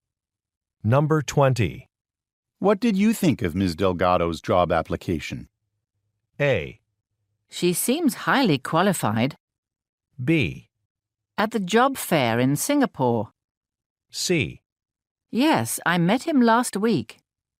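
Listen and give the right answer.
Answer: A: She seems highly qualified.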